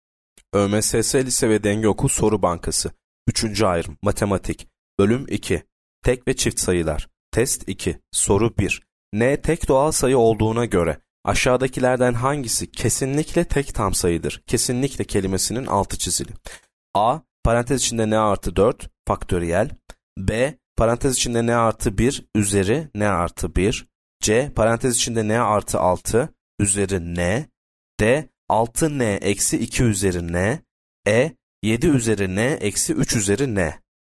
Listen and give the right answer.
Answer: Yanıt C. Parantez içinde n artı 6 üzeri n.